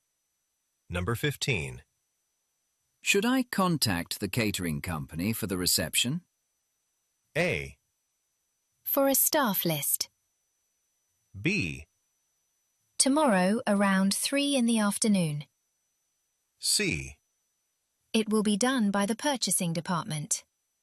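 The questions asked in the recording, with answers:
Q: Should I contact the catering company for the reception?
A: C: It will be done by the purchasing department.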